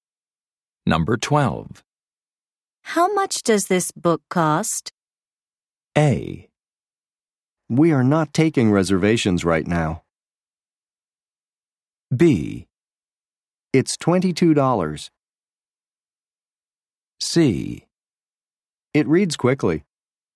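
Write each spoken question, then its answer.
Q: How much does this book cost?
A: B: It's $22.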